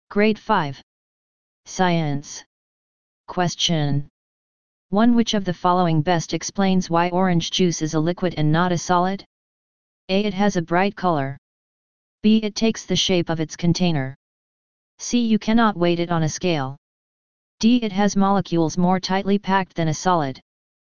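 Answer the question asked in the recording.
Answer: B: It takes the shape of its container.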